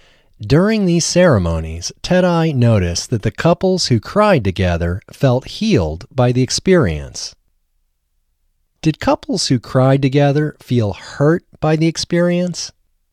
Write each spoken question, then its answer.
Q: Did couples who cried together feel hurt by the experience?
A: No, couples who cried together did not feel hurt by the experience.